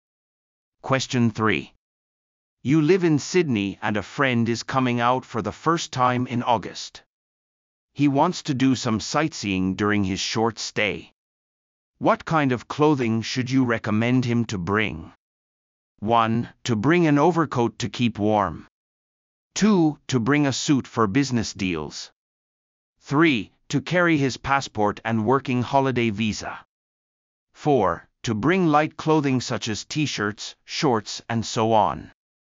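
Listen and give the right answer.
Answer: 1: To bring an overcoat to keep warm.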